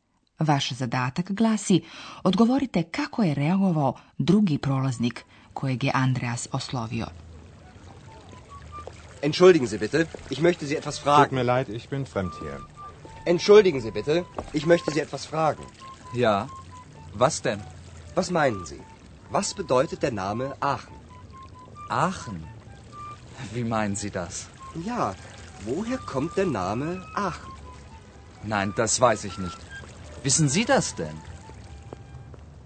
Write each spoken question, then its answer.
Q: Vaš zadatak glasi, odgovorite kako je reagovao drugi prolaznik kojeg je Andreas oslovio.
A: Drugi prolaznik, kojem se Andreas obratio, ne zna odakle dolazi naziv Aachen.